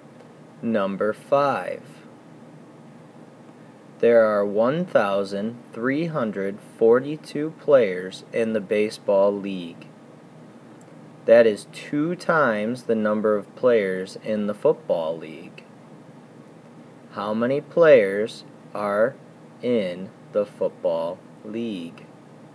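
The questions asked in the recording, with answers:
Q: How many players are in the football league?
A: 671 players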